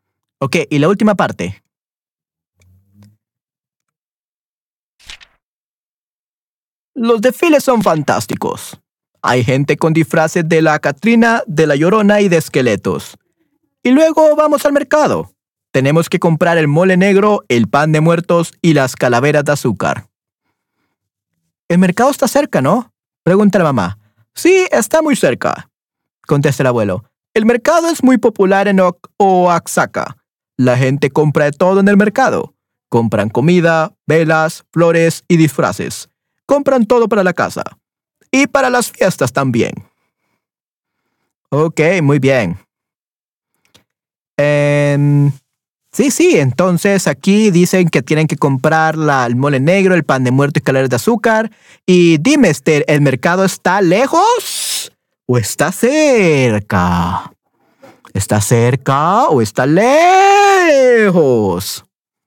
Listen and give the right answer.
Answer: Está cerca, muy bien, perfecto.